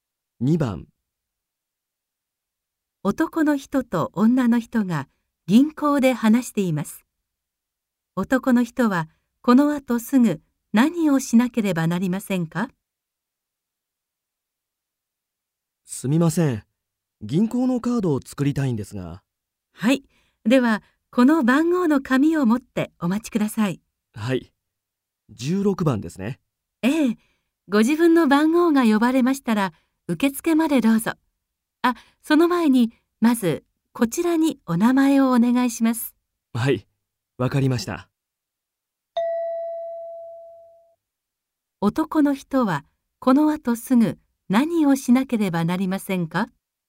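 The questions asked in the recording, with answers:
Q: 男の人はこのあとすぐ何をしなければなりませんか?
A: 紙に名前を書く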